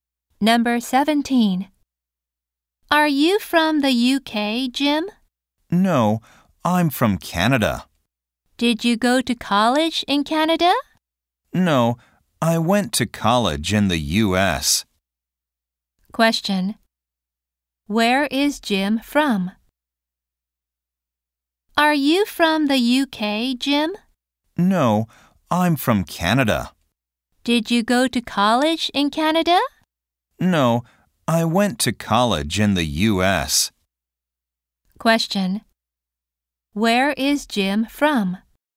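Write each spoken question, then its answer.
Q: Where is Jim from?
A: Canada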